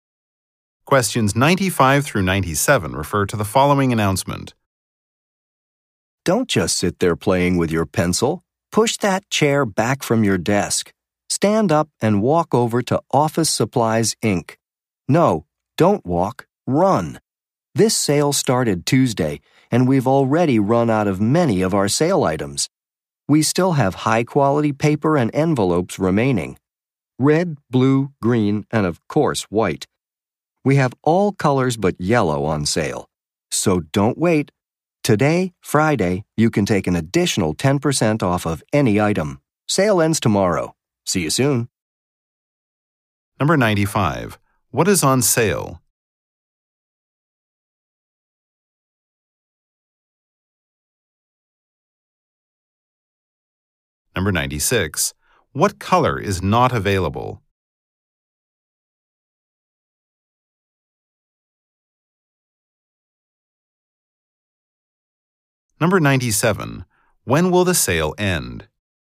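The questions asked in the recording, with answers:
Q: What is on sale?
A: Paper and envelopes

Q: What color is not available?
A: Yellow

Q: When will the sale end?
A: Saturday (tomorrow)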